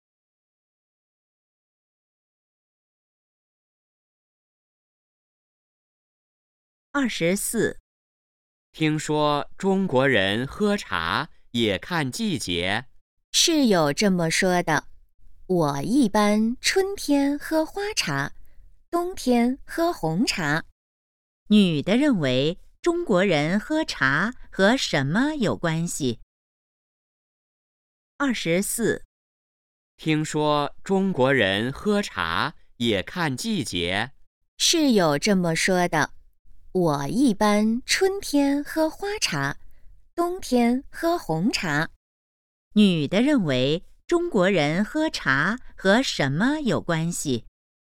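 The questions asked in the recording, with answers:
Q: 女的认为中国人喝茶和什么有关系?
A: 季节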